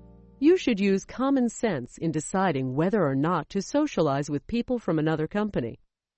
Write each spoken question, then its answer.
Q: You should use common sense in deciding whether or not to socialize with people from another company.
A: True. You should avoid a conflict of interests.